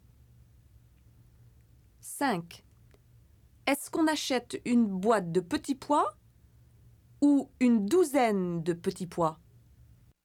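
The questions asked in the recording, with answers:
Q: Est-ce qu'on achète une boîte de petits pois ou une douzaine de petits pois?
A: une boîte de petits pois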